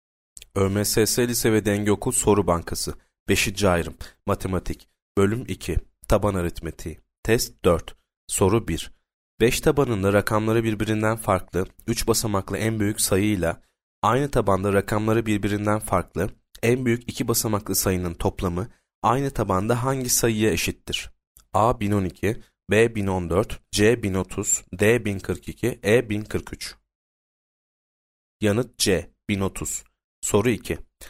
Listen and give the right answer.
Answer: Yanıt C 1030